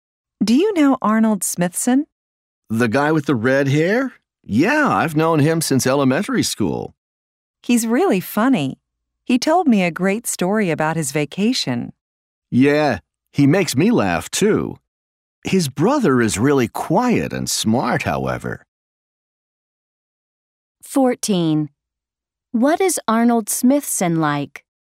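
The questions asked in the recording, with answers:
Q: What is Arnold Smithson like?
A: He is funny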